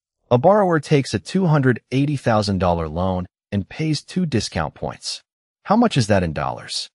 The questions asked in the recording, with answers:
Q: How much is that in dollars?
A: The answer is B, $5,600.